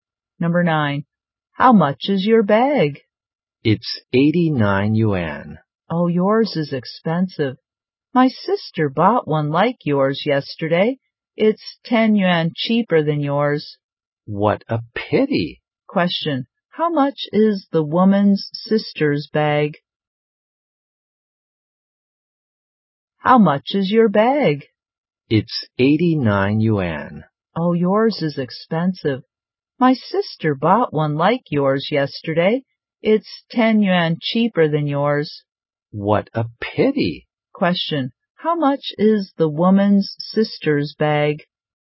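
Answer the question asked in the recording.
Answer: 79 yuan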